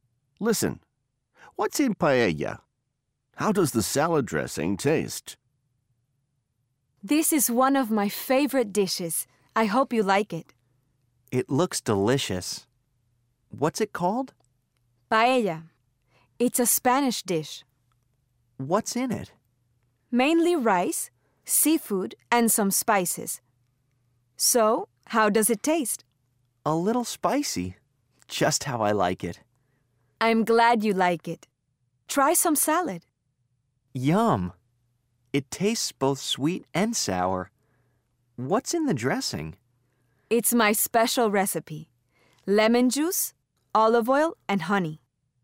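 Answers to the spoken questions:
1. Mainly rice, seafood, and some spices
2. Both sweet and sour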